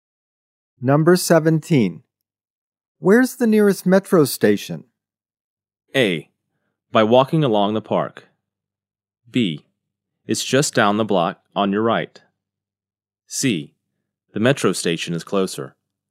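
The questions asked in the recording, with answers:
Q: Where's the nearest metro station?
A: B: It's just down the block on your right.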